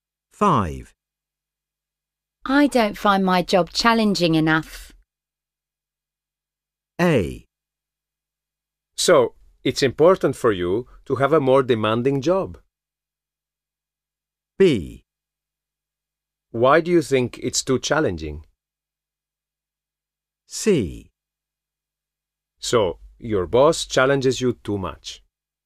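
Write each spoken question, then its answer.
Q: I don't find my job challenging enough.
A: A: So, it's important for you to have a more demanding job.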